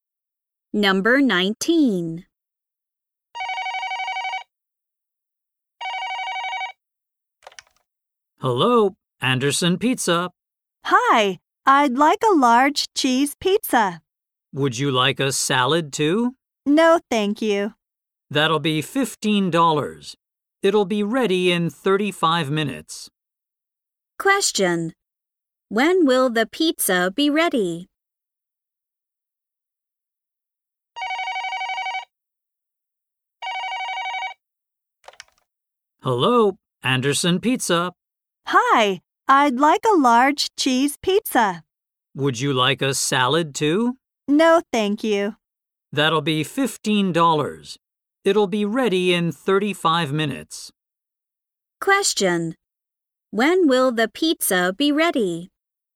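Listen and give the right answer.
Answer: In 35 minutes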